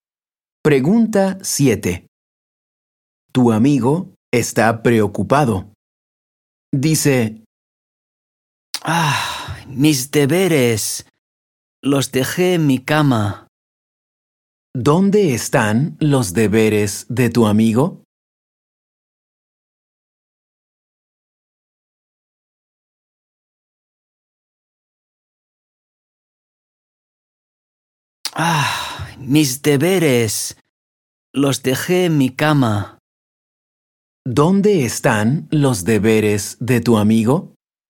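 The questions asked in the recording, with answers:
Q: ¿Dónde están los deberes de tu amigo?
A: En su cama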